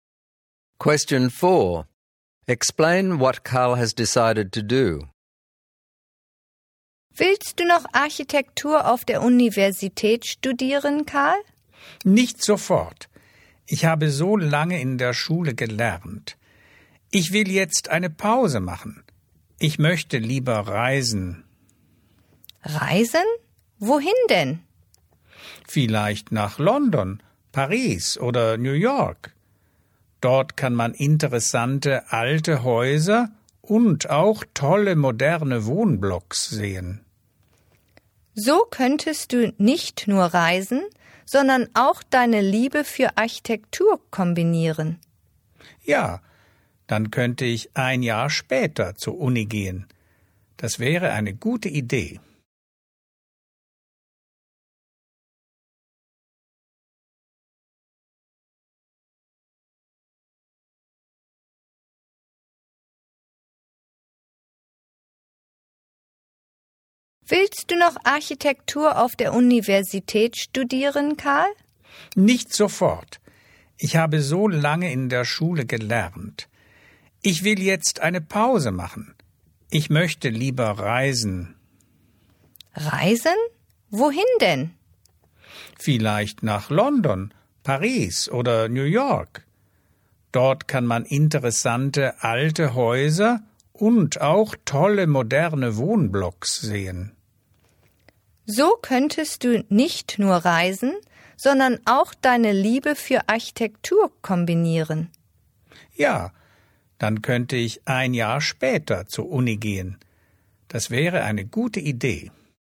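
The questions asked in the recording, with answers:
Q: Explain what Karl has decided to do.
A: Take a break and travel (London, Paris, New York) to see architecture, then go to university a year later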